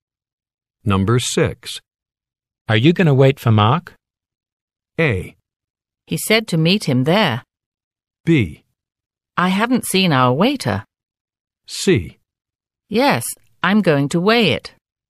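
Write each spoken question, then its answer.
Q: Are you going to wait for Mark?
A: A: He said to meet him there.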